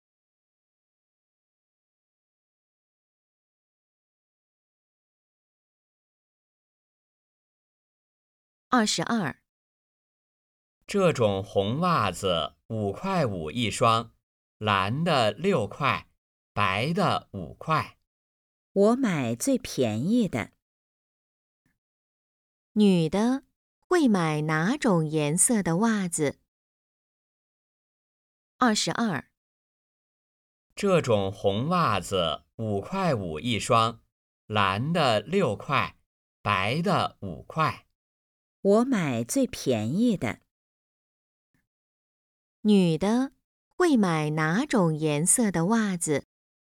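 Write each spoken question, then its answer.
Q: 女的会买哪种颜色的袜子?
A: 白色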